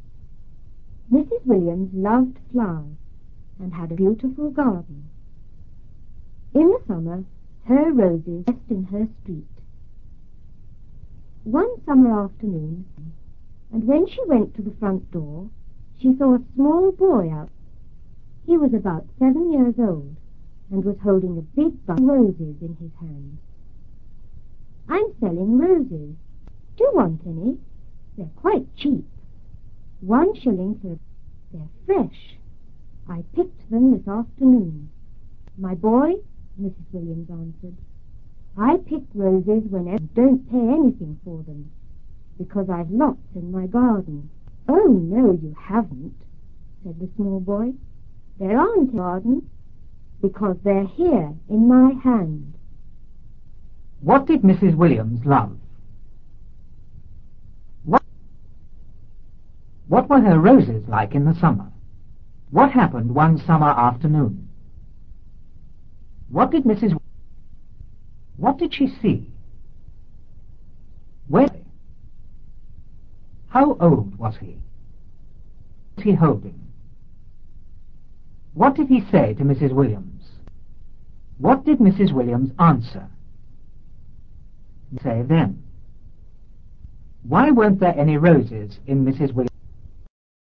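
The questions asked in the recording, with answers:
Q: What did Mrs. Williams love?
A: Flowers

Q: What did she see?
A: A small boy

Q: How old was he?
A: About 7 years old

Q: What was he holding?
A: A big bunch of roses

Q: What did Mrs. Williams answer?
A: She didn't pay for roses because she had lots in her garden

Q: Why weren't there any roses in Mrs. Williams?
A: Because the boy had picked them; they were in his hand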